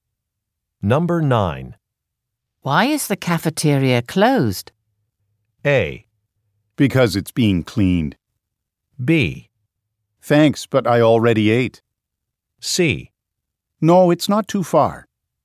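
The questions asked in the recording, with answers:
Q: Why is the cafeteria closed?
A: A: Because it's being cleaned.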